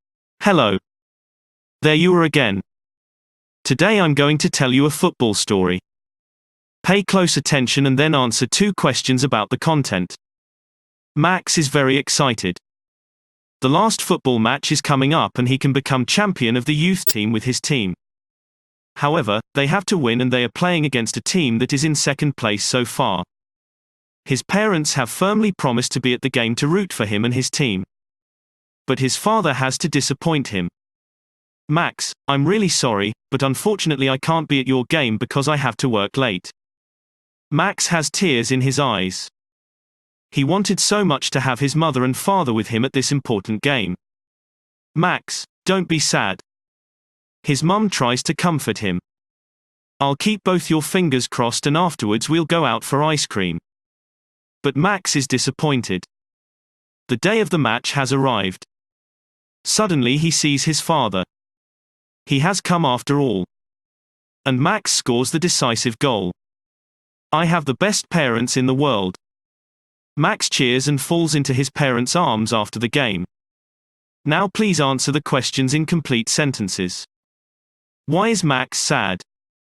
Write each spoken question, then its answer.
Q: Why is Max sad?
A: Max is sad because his father can't come to his football match.